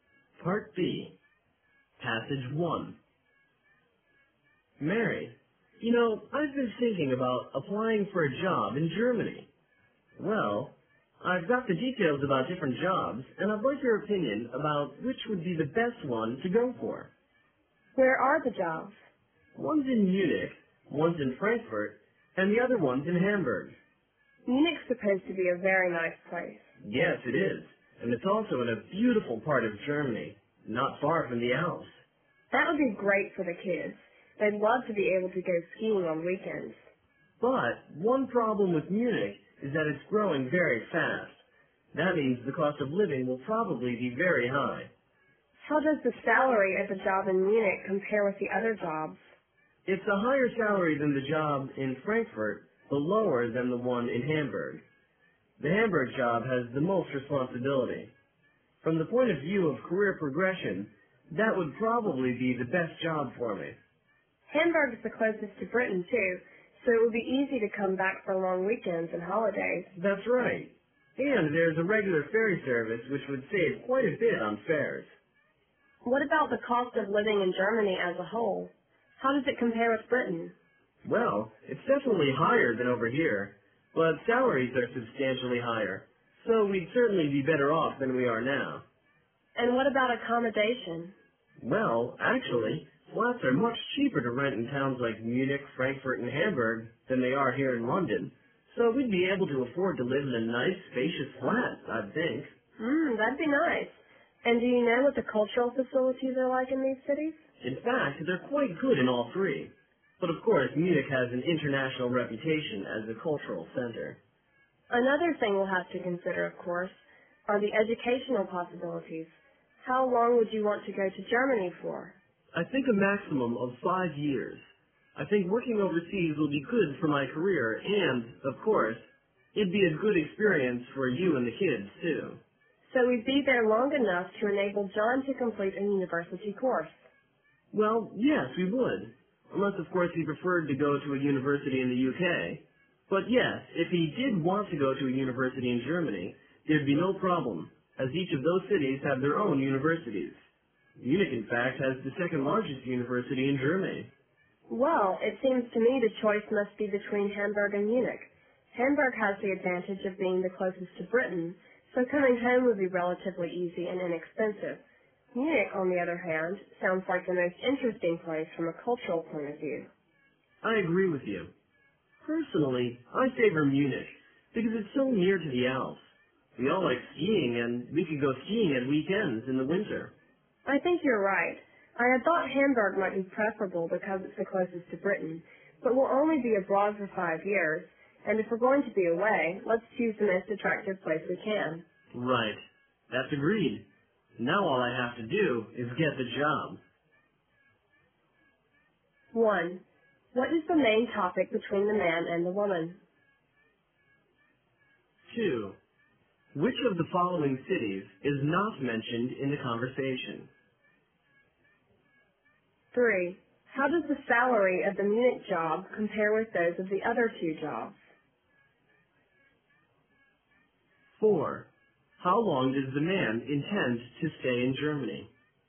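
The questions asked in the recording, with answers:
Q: What is the main topic between the man and the woman?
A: Which job in Germany the man should apply for

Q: How does the salary of the Munich job compare with those of the other two jobs?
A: Higher than the Frankfurt job but lower than the Hamburg job

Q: How long does the man intend to stay in Germany?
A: A maximum of 5 years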